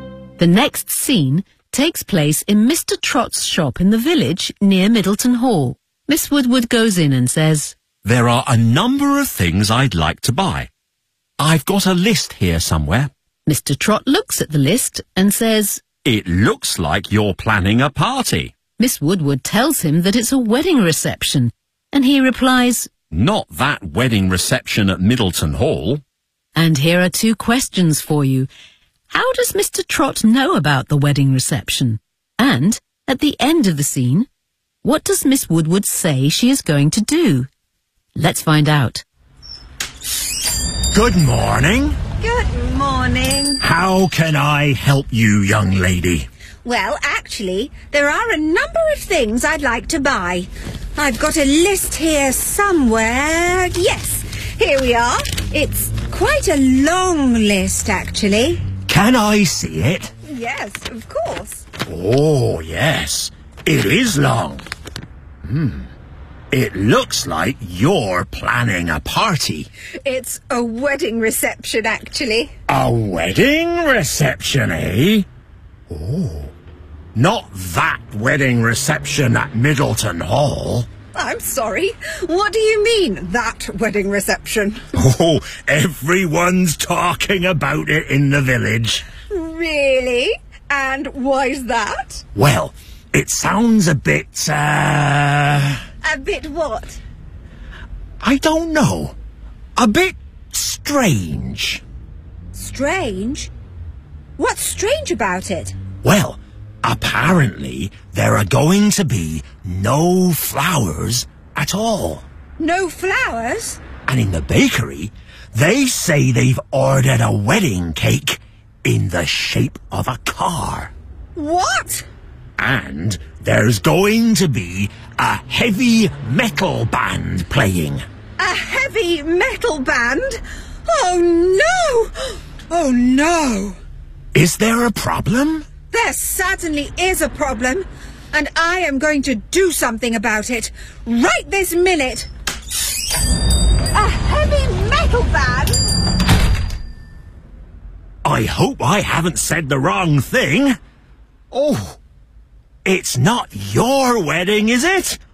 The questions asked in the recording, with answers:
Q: How does Mr. Trot know about the wedding reception?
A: Everyone's talking about it in the village.

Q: And, at the end of the scene, what does Miss Woodward say she is going to do?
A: I am going to do something about it right this minute.